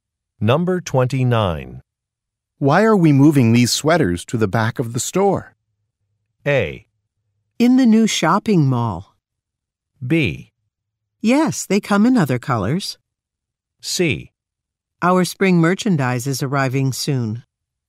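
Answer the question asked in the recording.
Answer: C: Our spring merchandise is arriving soon.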